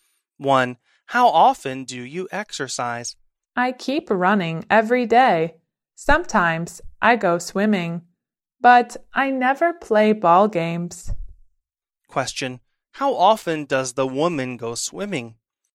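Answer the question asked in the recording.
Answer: Sometimes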